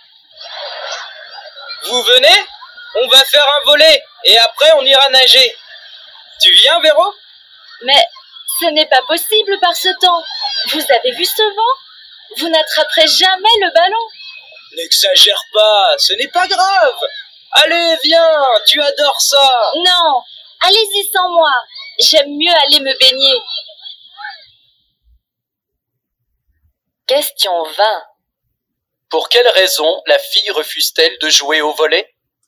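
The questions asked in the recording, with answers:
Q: Pour quelle raison la fille refuse-t-elle de jouer au volet ?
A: Parce qu'il y a trop de vent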